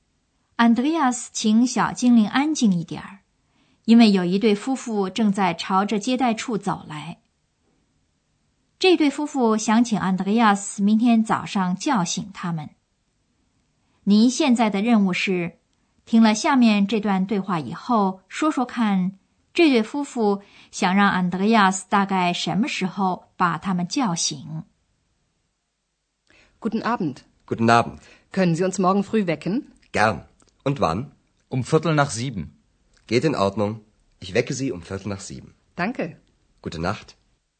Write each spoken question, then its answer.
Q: 您现在的任务是,听了下面这段对话以后,说说看,这对夫妇想让安德烈亚斯大概什么时候把他们叫醒。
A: 这对夫妇想让 Andreas 大概在七点钟左右把他们叫醒。